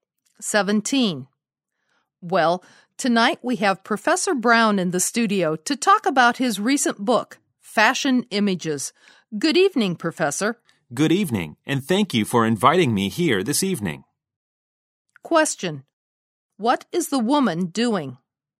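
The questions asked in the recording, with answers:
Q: What is the woman doing?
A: Hosting a program and interviewing Professor Brown about his book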